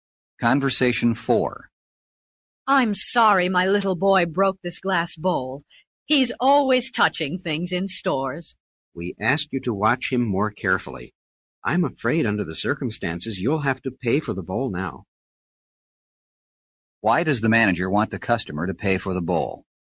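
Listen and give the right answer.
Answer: Her little boy broke it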